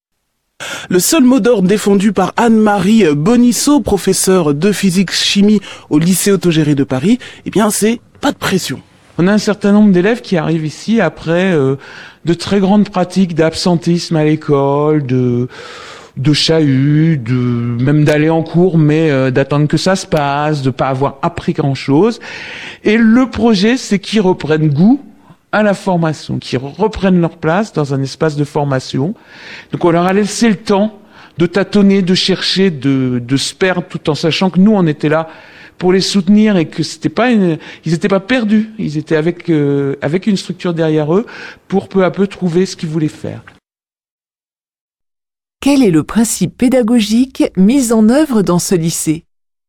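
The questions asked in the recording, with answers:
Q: Quel est le principe pédagogique mis en œuvre dans ce lycée ?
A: Pas de pression : on laisse aux élèves le temps de tâtonner et de chercher, avec le soutien des professeurs, pour qu'ils reprennent goût à la formation.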